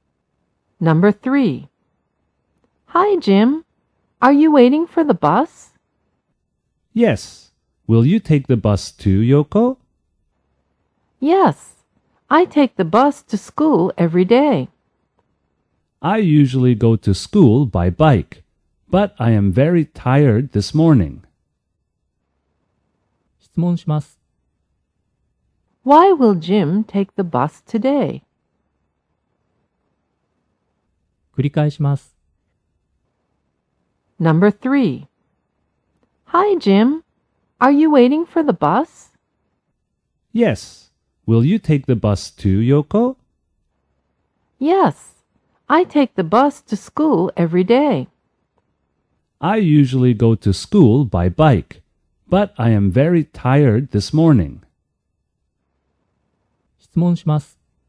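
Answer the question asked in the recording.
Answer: Because he is very tired this morning.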